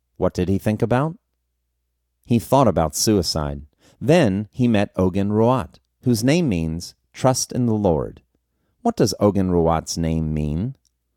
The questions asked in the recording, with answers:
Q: What does Ogen Ruat's name mean?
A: Ogen Ruat's name means trust in the Lord.